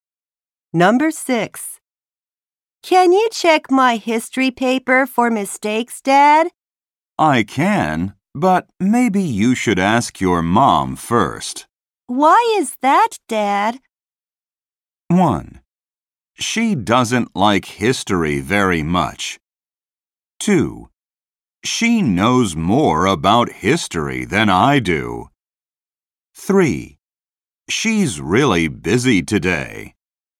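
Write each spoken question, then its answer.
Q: Why is that, Dad?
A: 2: She knows more about history than I do.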